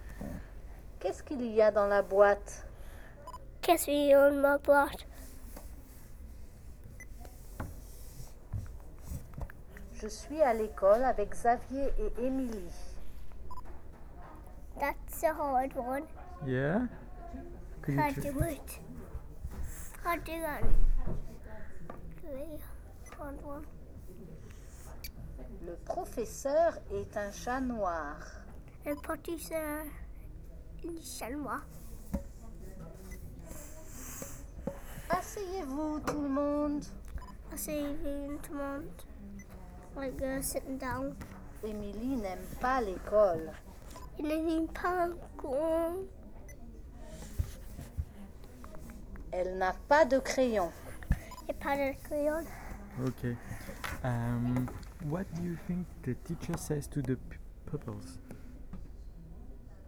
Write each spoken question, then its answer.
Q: What do you think the teacher says to the pupils?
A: Asseyez.